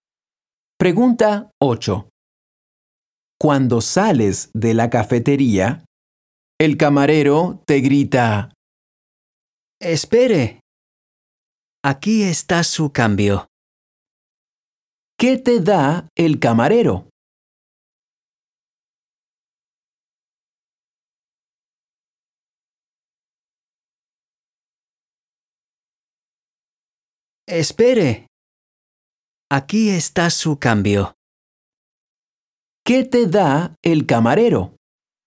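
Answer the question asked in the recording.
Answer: el cambio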